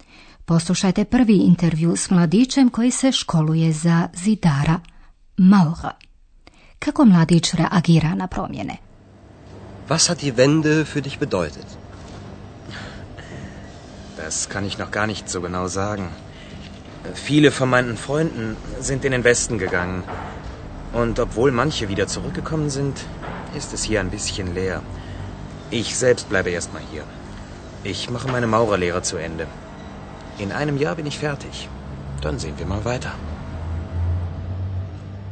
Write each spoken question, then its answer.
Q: Kako mladić reagira na promjene?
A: Mladić je još uvijek nesiguran, ne može još točno procijeniti što promjena za njega znači.